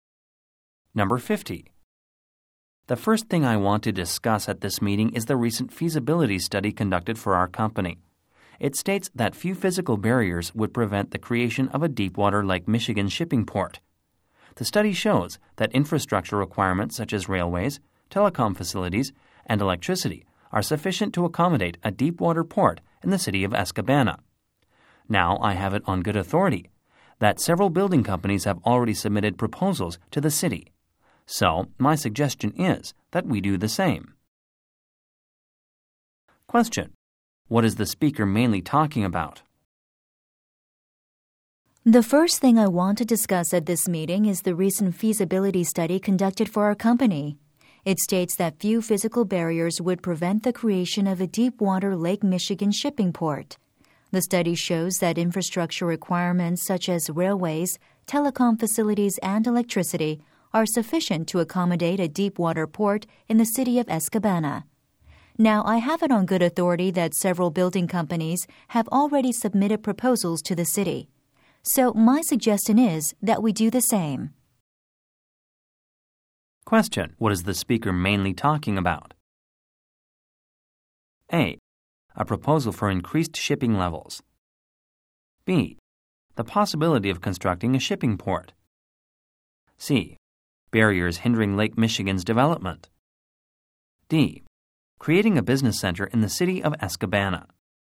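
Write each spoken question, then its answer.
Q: What is the speaker mainly talking about?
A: B: The possibility of constructing a shipping port.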